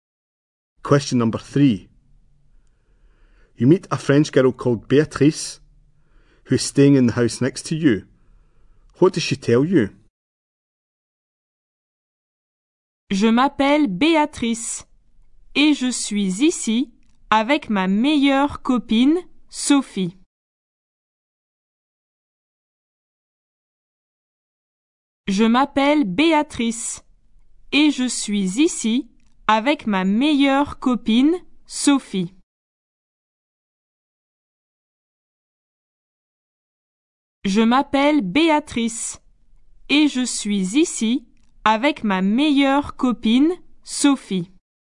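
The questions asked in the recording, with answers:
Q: What does she tell you?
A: She is there with her best friend, Sophie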